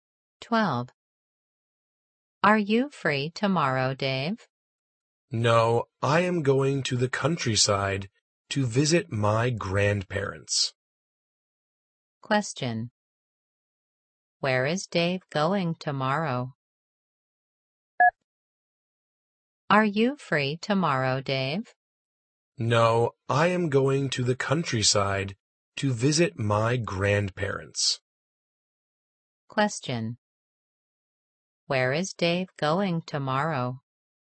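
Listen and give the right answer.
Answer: To the countryside to visit his grandparents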